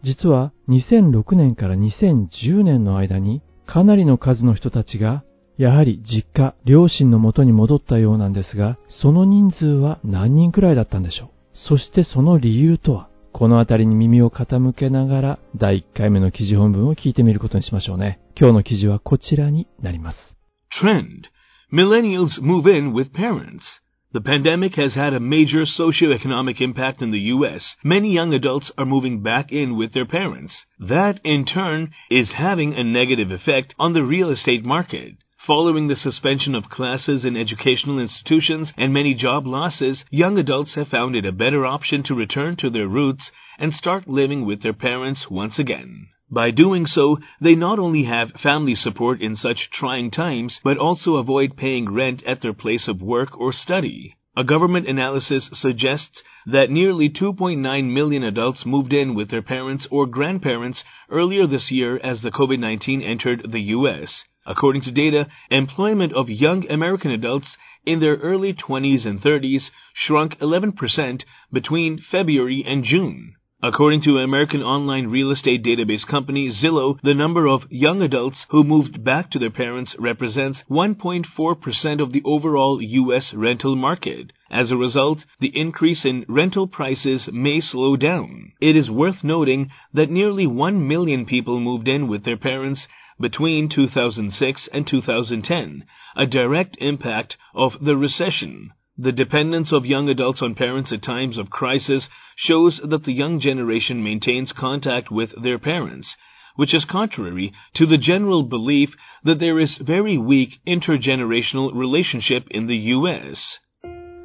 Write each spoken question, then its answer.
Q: 実は、2006年から2010年の間に、かなりの数の人たちが、やはり実家、両親の元に戻ったようなんですが、その人数は何人くらいだったんでしょう。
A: Nearly 1 million people 100万人近い人たちが Moved in with their parents 両親の元に戻ったということは注目に値する。

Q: そしてその理由とは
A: A direct impact of the recession.